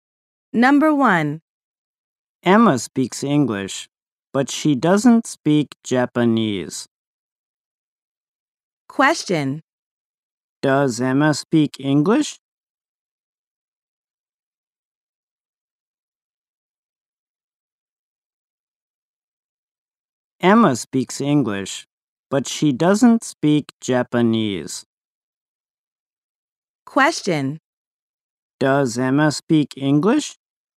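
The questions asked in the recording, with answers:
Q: Does Emma speak English?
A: Yes, she does.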